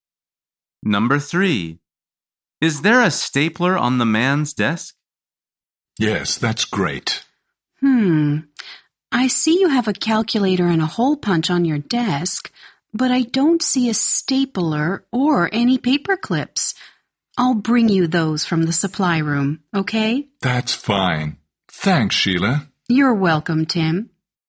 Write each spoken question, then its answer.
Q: Is there a stapler on the man's desk?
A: The answer is no.